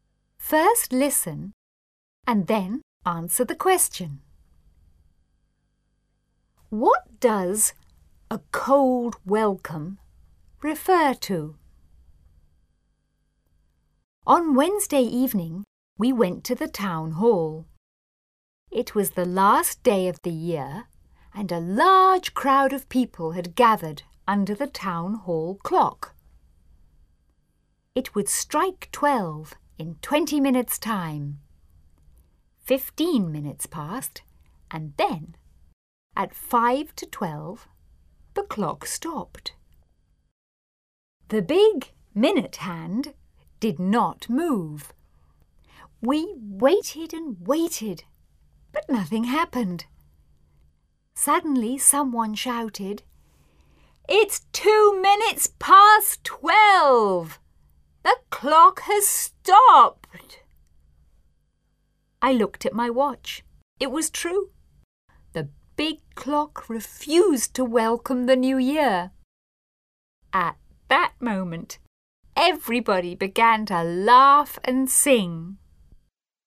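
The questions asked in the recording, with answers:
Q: What does a cold welcome refer to?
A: The town hall clock stopped before midnight and did not welcome the new year.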